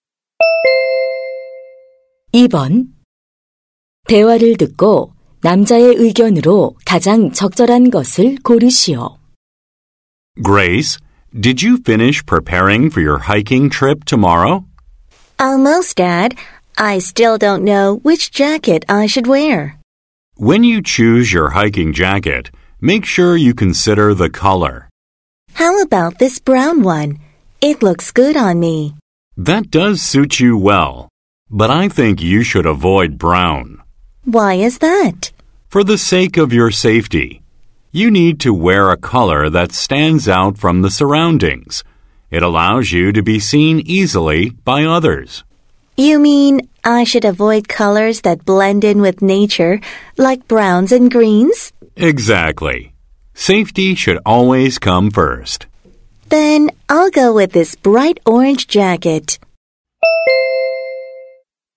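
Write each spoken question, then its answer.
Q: 대화를 듣고 남자의 의견으로 가장 적절한 것을 고르시오.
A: 등산할 때는 안전을 위해 눈에 잘 띄는 색의 옷을 입어야 한다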